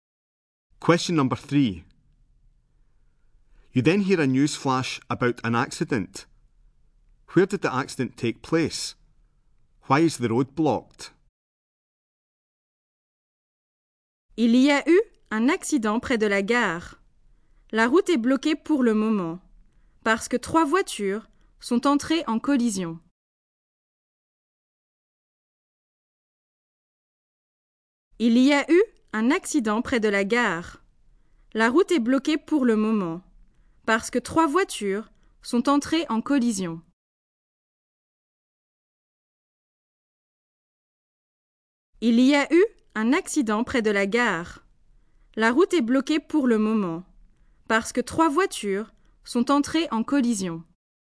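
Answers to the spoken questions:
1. Near the station
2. Three cars collided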